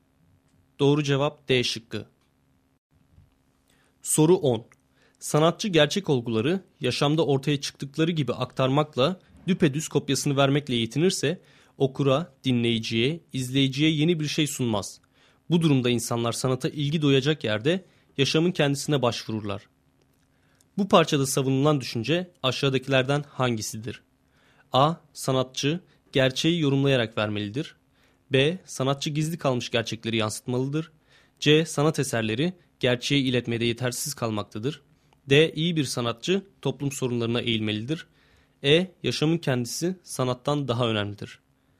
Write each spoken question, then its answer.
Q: Bu parçada savunulan düşünce aşağıdakilerden hangisidir?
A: Doğru cevap A şıkkı.